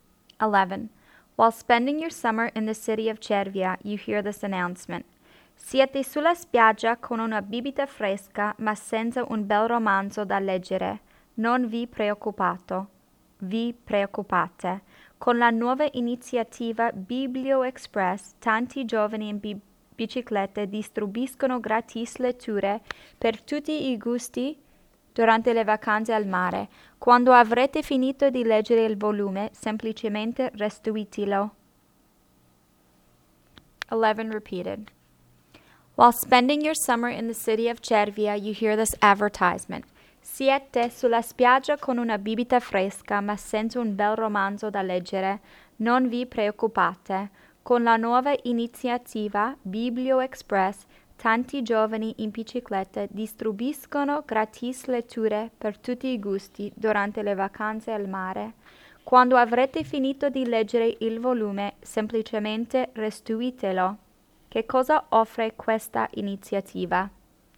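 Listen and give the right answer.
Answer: Libri gratis da leggere in spiaggia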